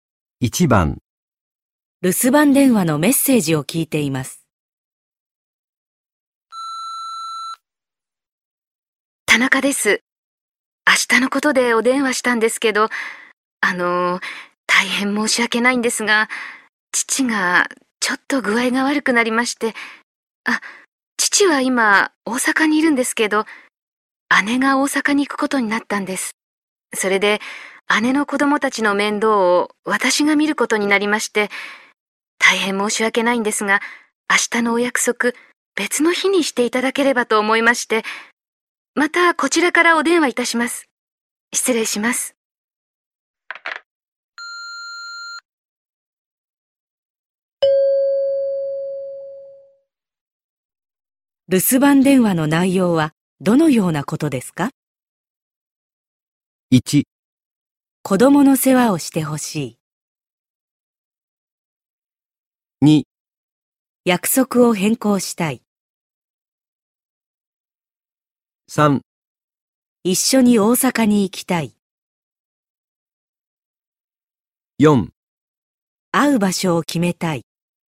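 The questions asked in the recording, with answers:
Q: 守番電話の内容はどのようなことですか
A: 2: 約束を変更したい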